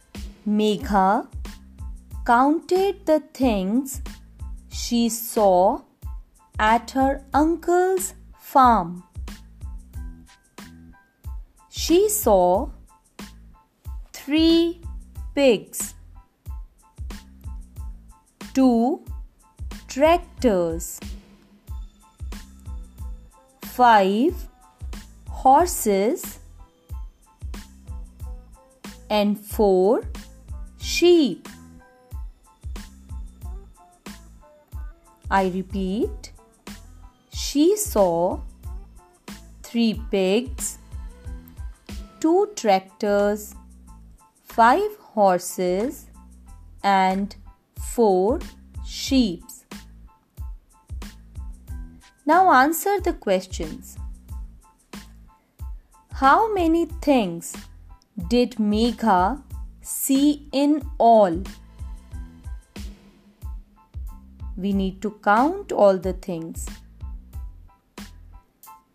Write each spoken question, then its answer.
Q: How many things did Megha see in all?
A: She saw 14 things in all.